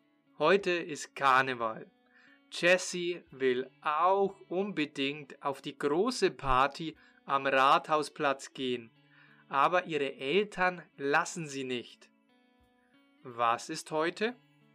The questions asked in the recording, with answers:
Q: Was ist heute?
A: Karneval. Heute ist Karneval, also Fasching.